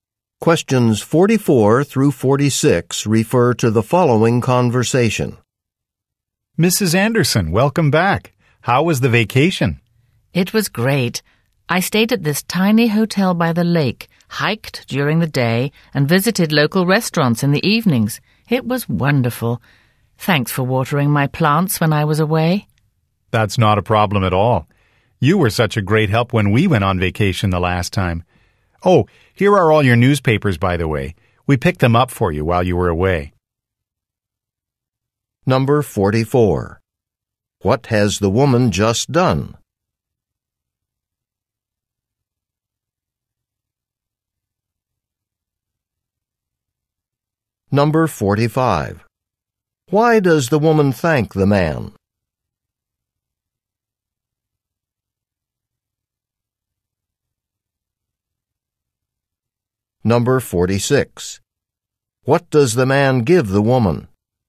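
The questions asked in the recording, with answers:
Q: What has the woman just done?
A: Come back from a vacation

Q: Why does the woman thank the man?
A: For watering her plants

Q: What does the man give the woman?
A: Her newspapers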